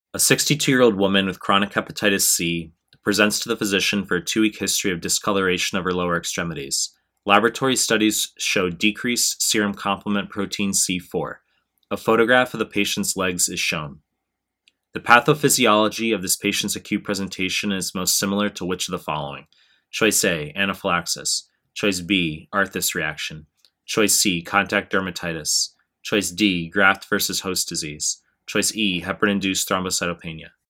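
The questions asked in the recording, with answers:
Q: The pathophysiology of this patient's acute presentation is most similar to which of the following?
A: B: arthritis reaction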